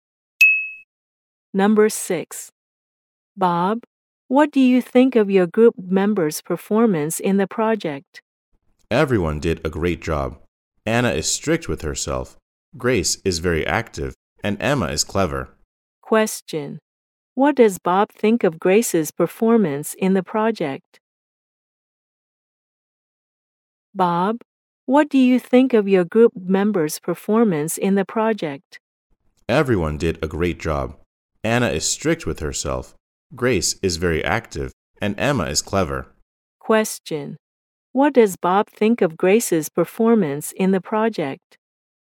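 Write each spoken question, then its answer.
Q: What does Bob think of Grace's performance in the project?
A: She is very active.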